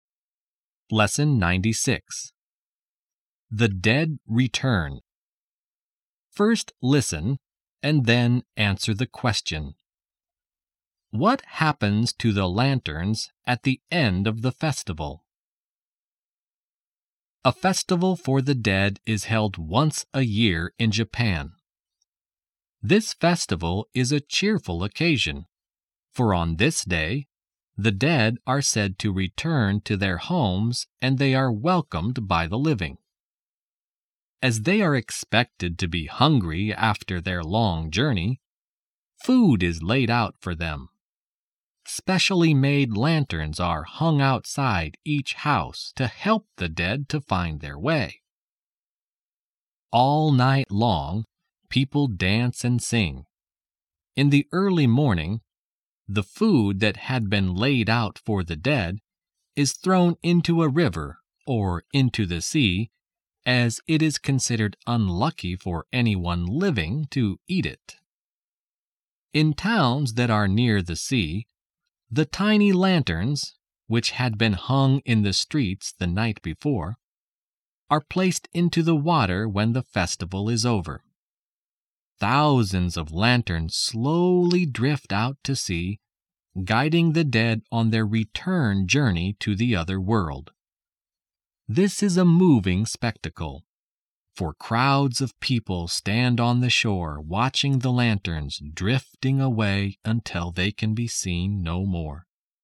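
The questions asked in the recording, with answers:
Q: What happens to the lanterns at the end of the festival?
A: They are placed into the water and drift out to sea, guiding the dead back to the other world.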